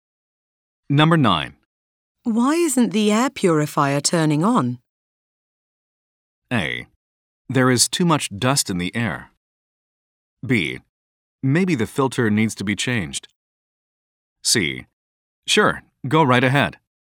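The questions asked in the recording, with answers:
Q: Why isn't the air purifier turning on?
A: B: Maybe the filter needs to be changed.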